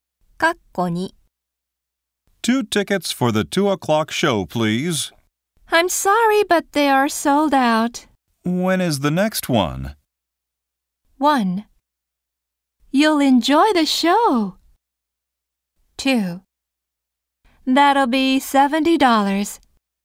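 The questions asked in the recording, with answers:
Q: When is the next one?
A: 3: It starts at 5.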